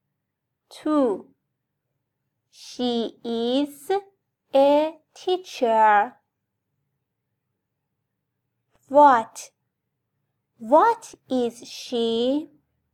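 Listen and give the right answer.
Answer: a teacher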